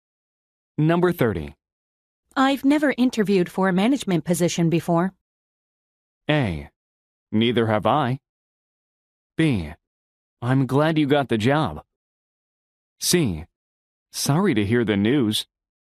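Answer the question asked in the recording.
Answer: A: Neither have I.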